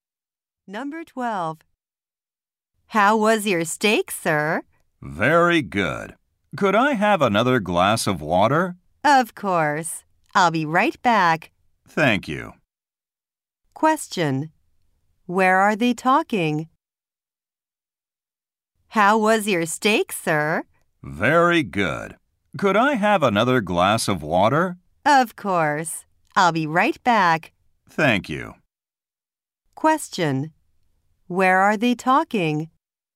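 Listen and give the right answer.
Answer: At a restaurant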